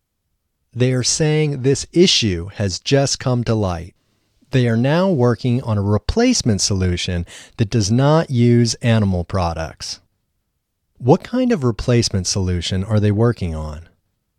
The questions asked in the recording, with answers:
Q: What kind of replacement solution are they working on?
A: They are working on a replacement solution that does not use animal products.